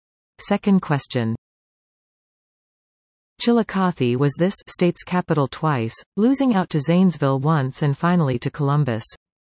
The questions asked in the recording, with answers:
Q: Chillicothe was this state's capital twice, losing out to Zanesville once and finally to Columbus.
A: Ohio.